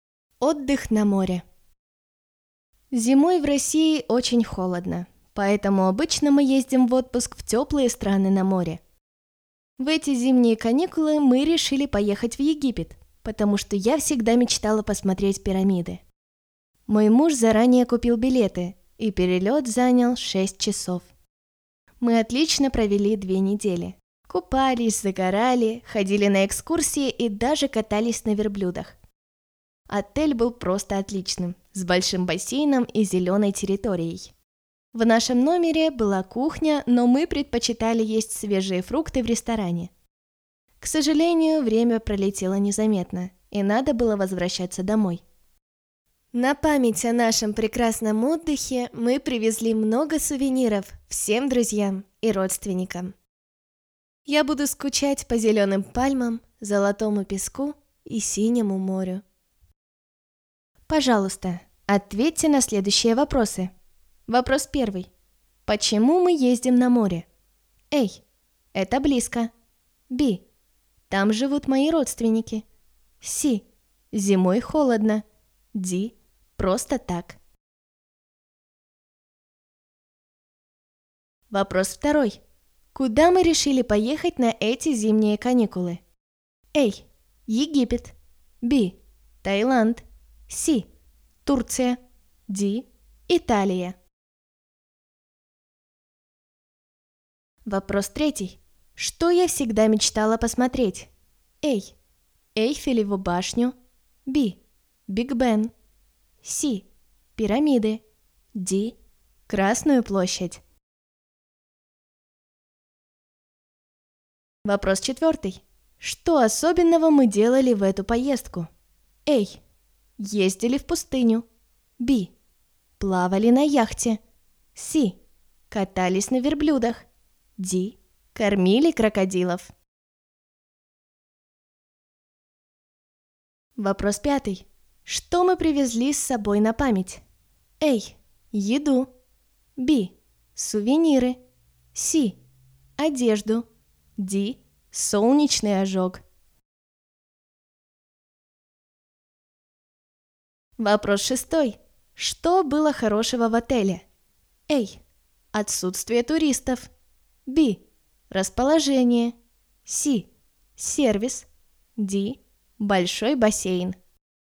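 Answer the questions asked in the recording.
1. C: Зимой холодно.
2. A: Египет.
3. C: Пирамиды.
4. C: Катались на верблюдах.
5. B: Сувениры.
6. D: Большой бассейн.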